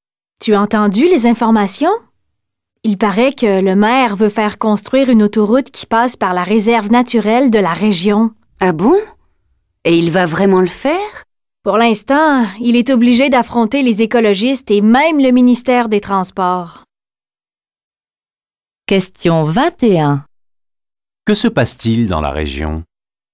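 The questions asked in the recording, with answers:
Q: Que se passe-t-il dans la région?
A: Le maire veut faire construire une autoroute à travers la réserve naturelle, ce qui l'oppose aux écologistes et au ministère des Transports.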